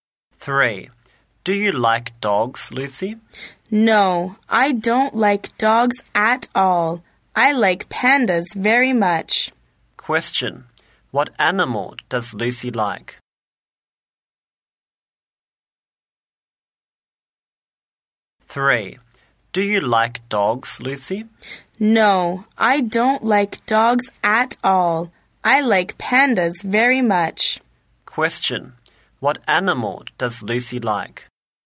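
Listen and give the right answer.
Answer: Pandas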